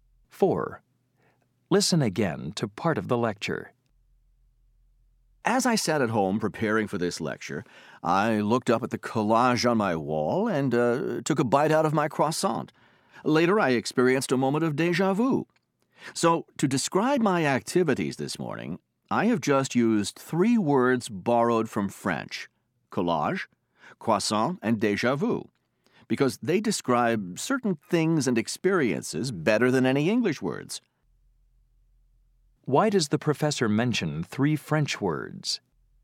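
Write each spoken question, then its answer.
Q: Why does the professor mention three French words?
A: To show that English borrows words from other languages because they describe certain things better than English words.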